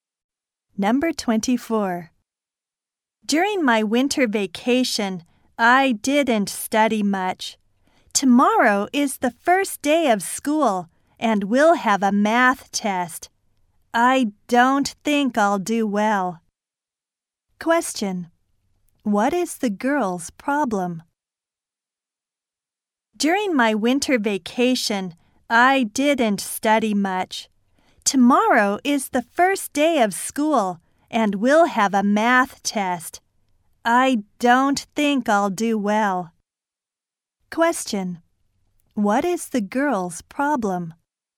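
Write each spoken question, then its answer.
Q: What is the girl's problem?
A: She didn't study much for tomorrow's math test.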